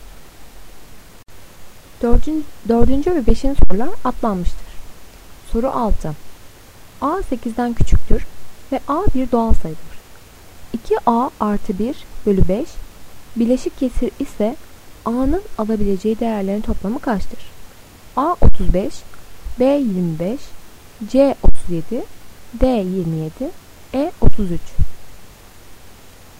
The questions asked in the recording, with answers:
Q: 2A artı 1 bölü 5 bileşik kesir ise A'nın alabileceği değerlerin toplamı kaçtır?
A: Doğru cevap D 27.